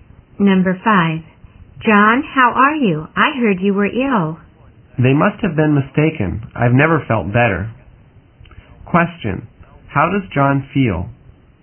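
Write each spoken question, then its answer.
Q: How does John feel?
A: Very well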